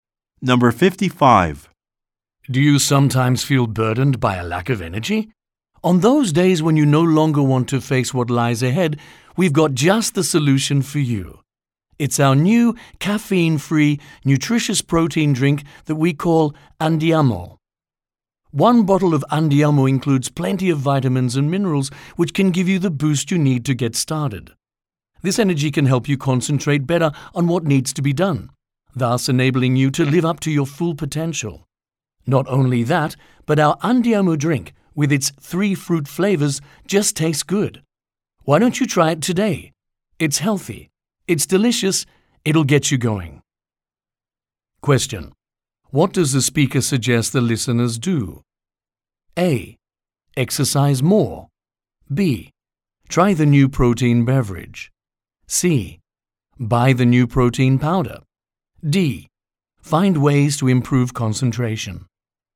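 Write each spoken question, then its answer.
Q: What does the speaker suggest the listeners do?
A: B: Try the new protein beverage.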